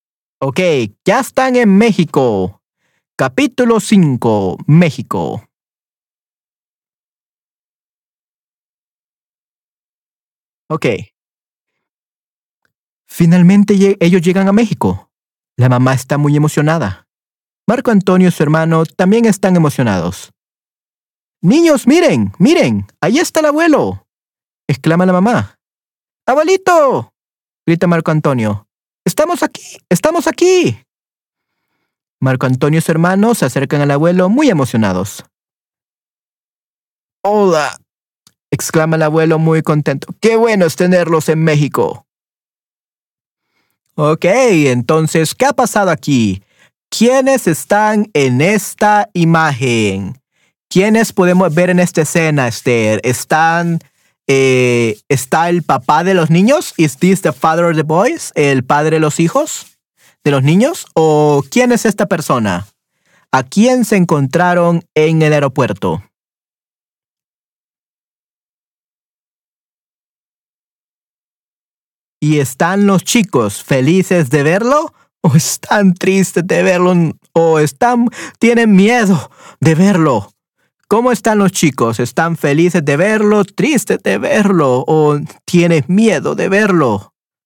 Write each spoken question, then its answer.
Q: ¿A quién se encontraron en el aeropuerto?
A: abuelo, el padre es su madre.

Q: ¿Cómo están los chicos? ¿Están felices de verlo, tristes de verlo o tienes miedo de verlo?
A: Correcto, sí, sí y todos están felices.